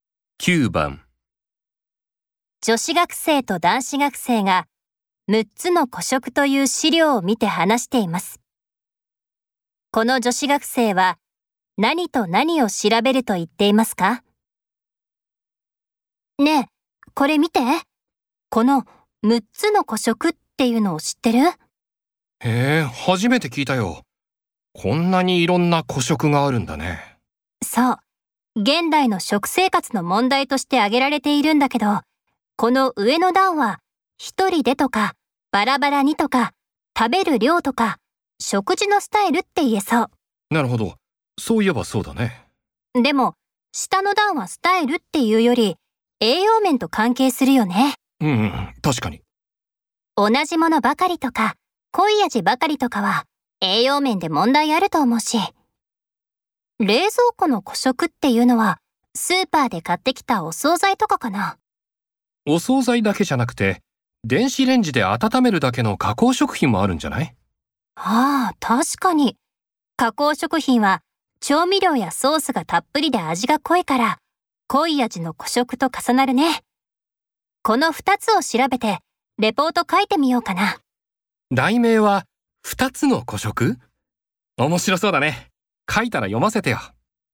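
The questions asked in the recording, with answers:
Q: この女子学生は何と何を調べると言っていますか?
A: 冷蔵庫の古色(加工食品など)と濃い味の古色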